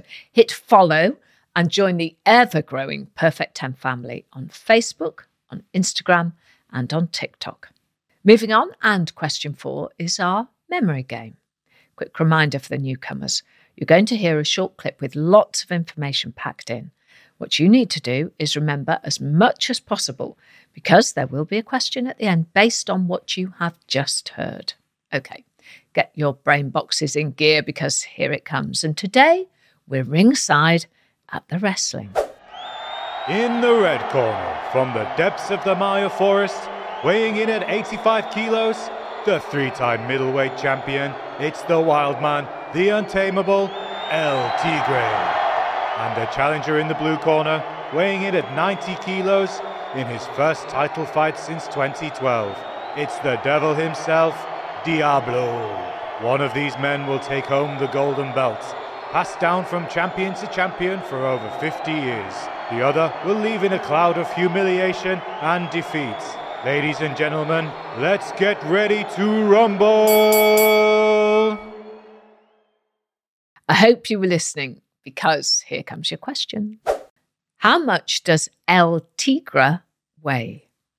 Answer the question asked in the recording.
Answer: And the answer in the clip was 85 kilograms.